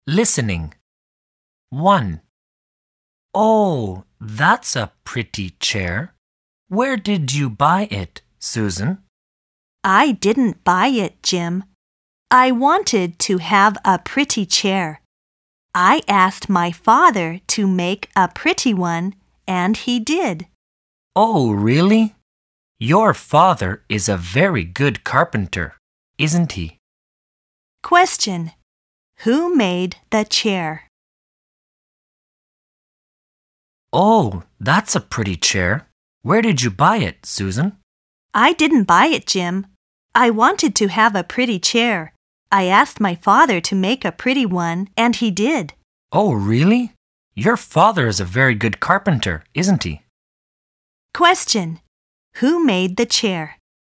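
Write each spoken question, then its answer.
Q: Who made the chair?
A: Susan's father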